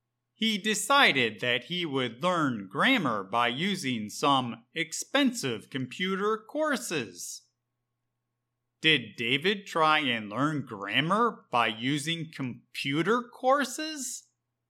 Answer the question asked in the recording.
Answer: Yes. David decided to learn grammar by using some expensive computer courses.